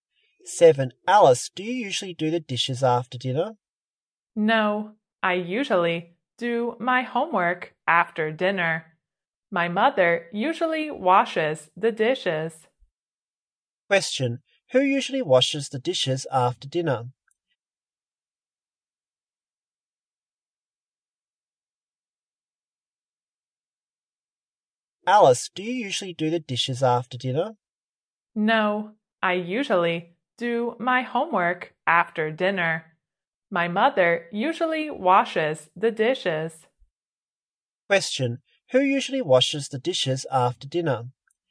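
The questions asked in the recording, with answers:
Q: Who usually washes the dishes after dinner?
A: Alice's mother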